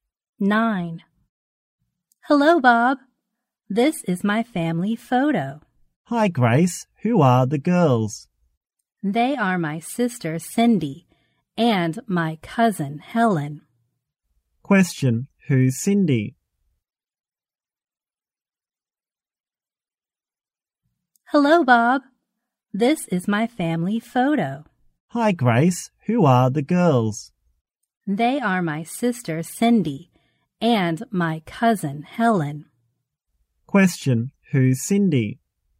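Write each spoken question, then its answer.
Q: who's Cindy?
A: Grace's sister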